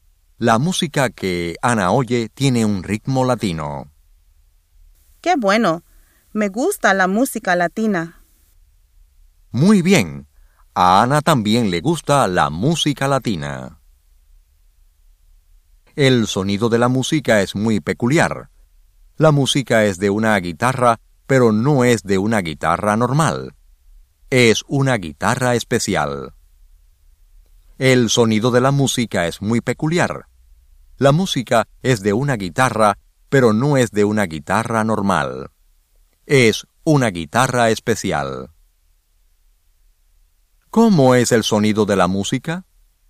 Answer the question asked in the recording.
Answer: Tiene un sonido muy peculiar.